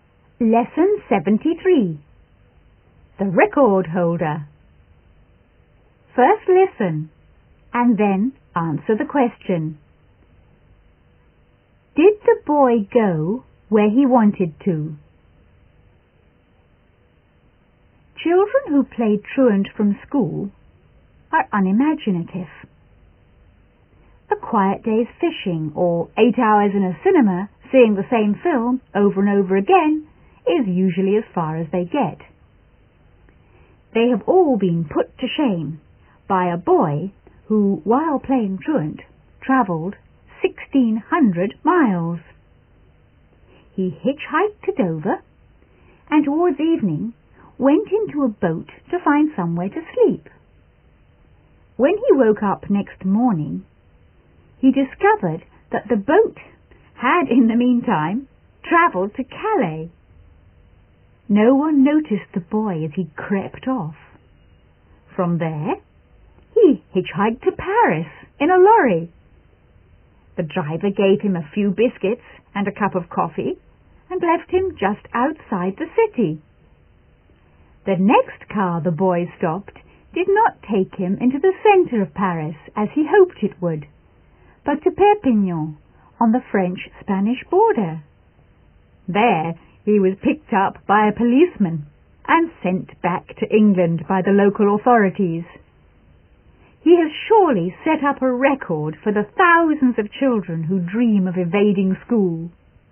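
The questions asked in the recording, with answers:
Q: Did the boy go where he wanted to?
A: No, he wanted to go to Paris but ended up in Perpignan.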